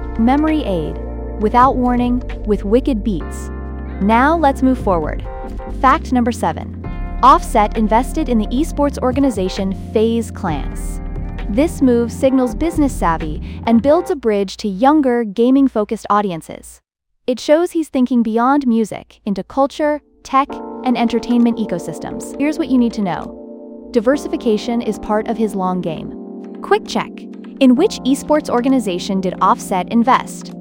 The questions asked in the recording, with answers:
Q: In which esports organization did Offset invest?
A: Correct answer, FaZe Clan.